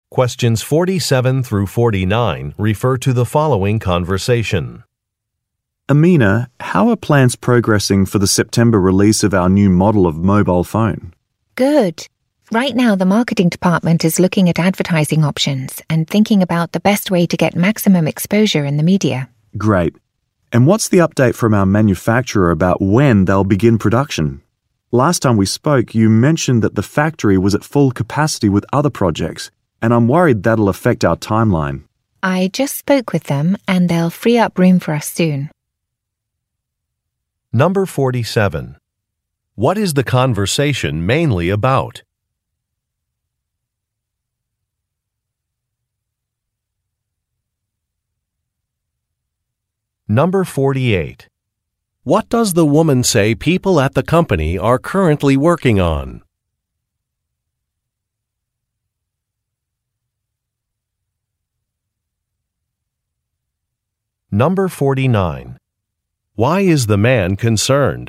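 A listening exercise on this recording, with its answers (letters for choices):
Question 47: What is the conversation mainly about?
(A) A policy change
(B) A product launch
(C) Some customer feedback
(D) A scheduled maintenance visit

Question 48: What does the woman say people at the company are currently working on?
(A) Exploring publicity options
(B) Finding a new vendor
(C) Assembling a sales team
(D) Negotiating a monthly fee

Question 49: Why is the man concerned?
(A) Customers have complained.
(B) Price estimates are high.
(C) Some changes require approval.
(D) A plan may be delayed.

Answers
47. B
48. A
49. D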